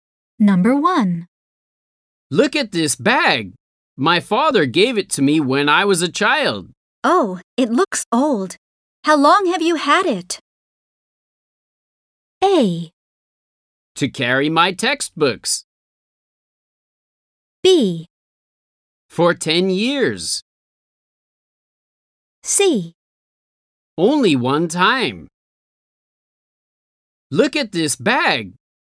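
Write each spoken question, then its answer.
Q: Oh, it looks old. How long have you had it?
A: B: For 10 years.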